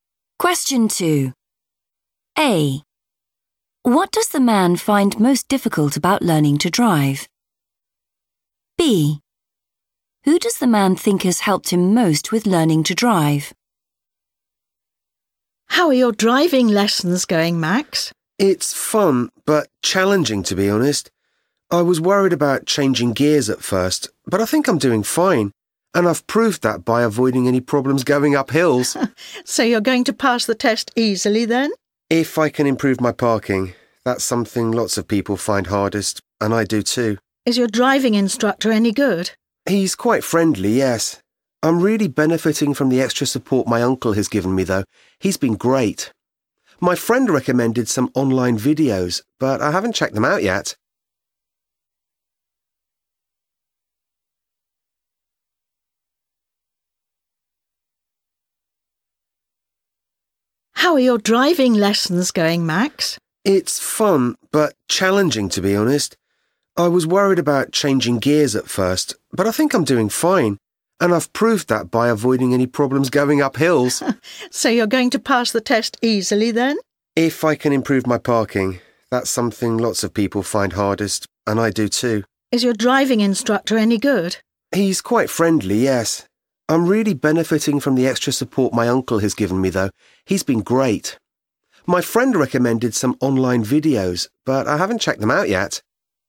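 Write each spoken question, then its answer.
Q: What does the man find most difficult about learning to drive?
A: parking

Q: Who does the man think has helped him most with learning to drive?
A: his uncle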